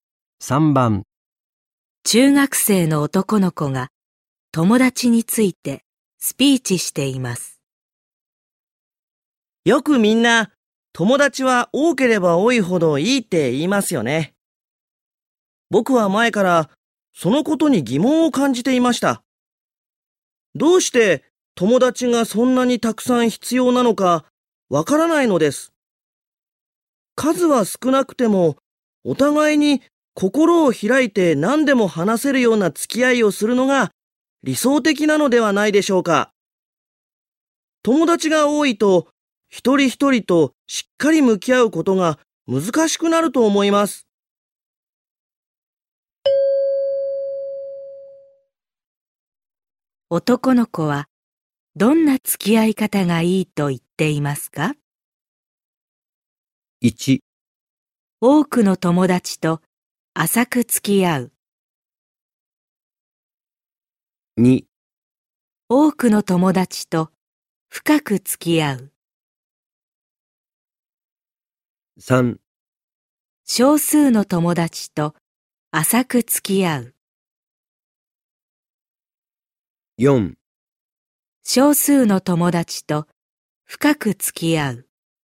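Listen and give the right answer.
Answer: 4: 少数の友達と深く付き合う。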